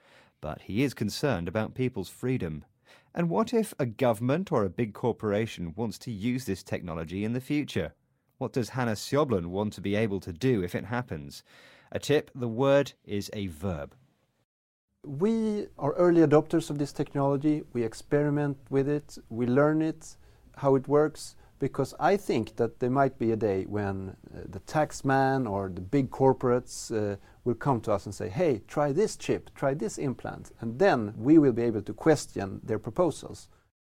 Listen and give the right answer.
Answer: He wants to question their proposals.